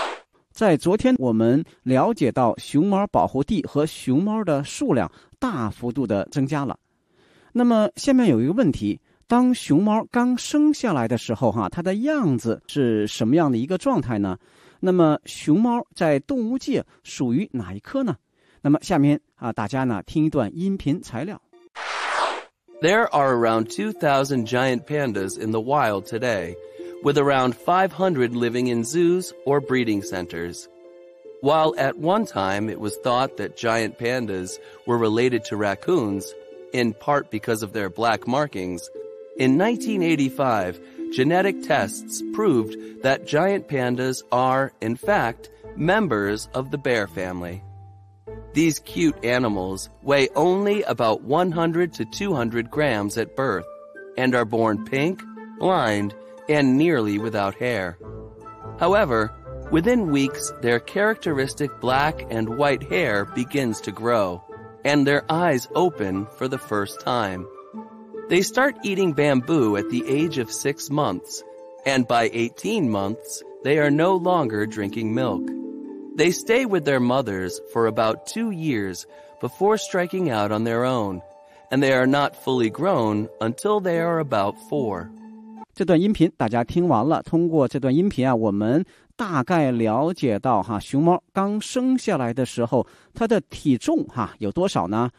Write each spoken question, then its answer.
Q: 当熊猫刚生下来的时候,它的样子是什么样的一个状态呢?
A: 生下来的时候它的颜色也不是我们看到大熊猫的这个黑白相间的状态,而是一个 pink 粉红的。

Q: 那么熊猫在动物界属于哪一科呢?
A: 经过一系列的研究和呢科学考证呢,认为熊猫属于呢 bear family 熊科。

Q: 这段音频大家听完了,通过这段音频我们大概了解到熊猫刚生下来的时候它的体重有多少呢?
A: 它的体重只有100到200克